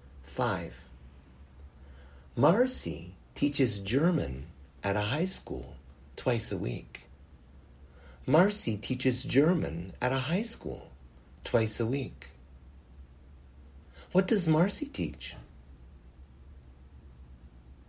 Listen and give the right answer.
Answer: Marcy teaches German.